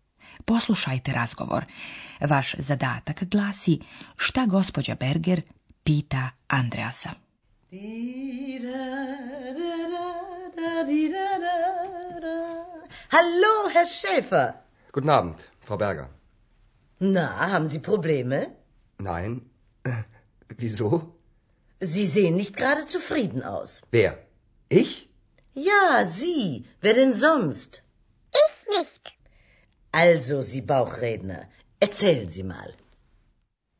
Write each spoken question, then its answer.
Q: Vaš zadatak glasi šta gospođa Berger pita Andreasa.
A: Gospođa Berger pita dakle Andreasa, da li on ima problema?